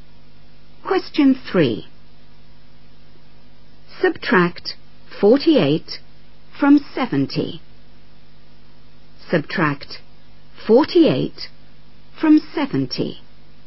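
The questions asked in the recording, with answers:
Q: Subtract 48 from 70.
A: 22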